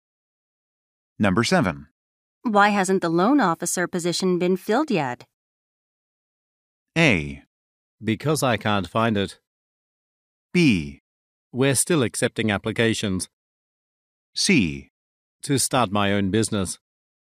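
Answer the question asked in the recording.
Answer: B: We're still accepting applications.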